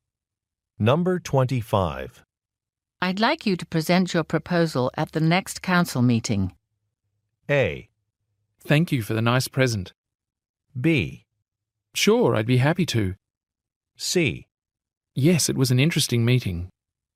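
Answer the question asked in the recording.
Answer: B: Sure, I'd be happy to.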